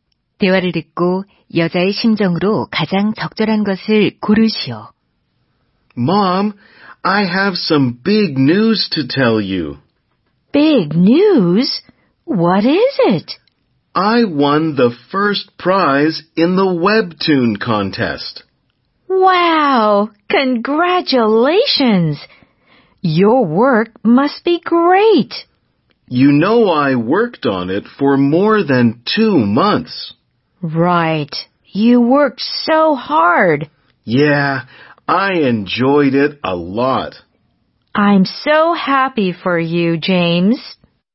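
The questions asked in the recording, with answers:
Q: 대화를 듣고 여자의 심정으로 가장 적절한 것을 고르시오.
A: 기쁨, 뿌듯함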